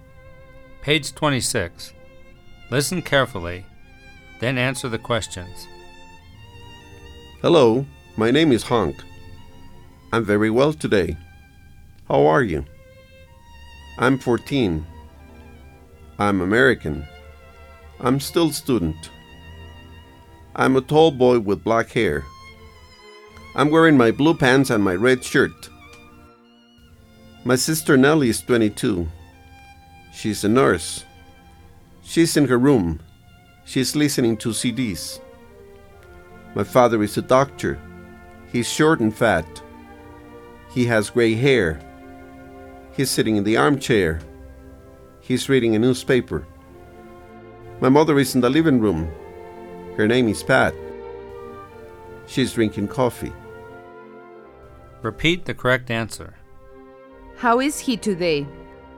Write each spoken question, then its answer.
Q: How is he today?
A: He's very well today.